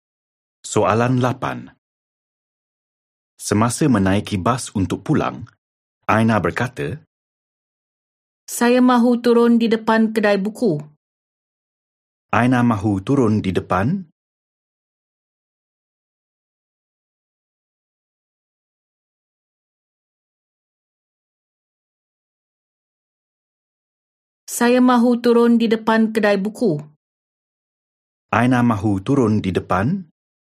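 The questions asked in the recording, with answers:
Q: Aina mahu turun di depan?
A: Kedai buku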